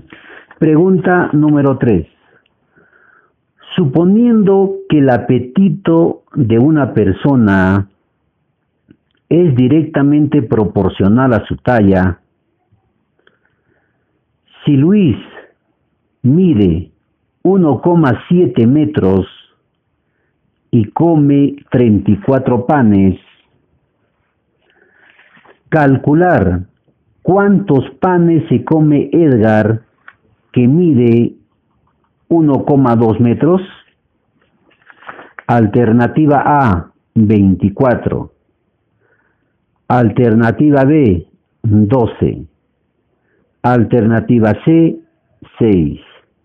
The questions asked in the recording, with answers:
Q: calcular cuántos panes se come Edgar, que mide 1,2 metros.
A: La respuesta correcta es la alternativa A, 24.